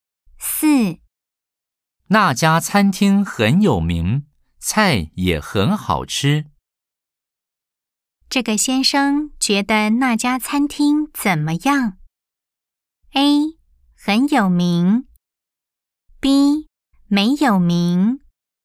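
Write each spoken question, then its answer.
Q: 这个先生觉得那家餐厅怎么样?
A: A: 很有名。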